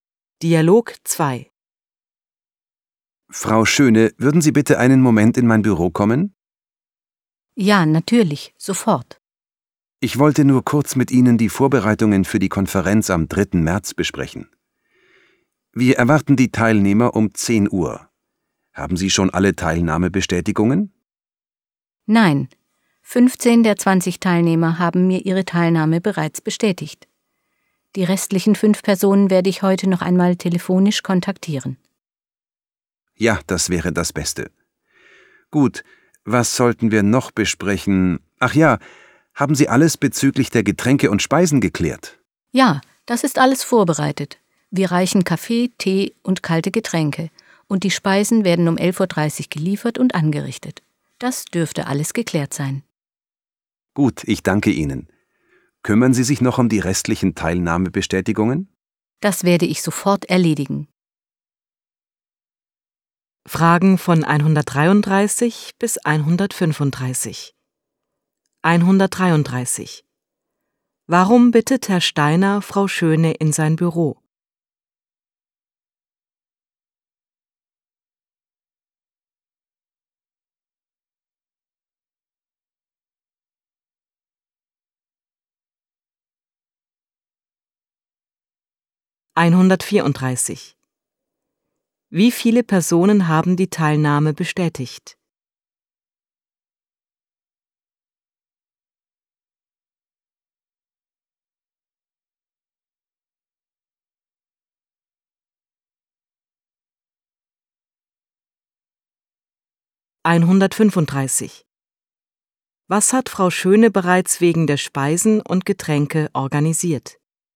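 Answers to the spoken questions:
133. Um die Vorbereitungen für die Konferenz zu besprechen
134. 15
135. Kaffee, Tee und kalte Getränke; die Speisen werden um 11.30 Uhr geliefert und angerichtet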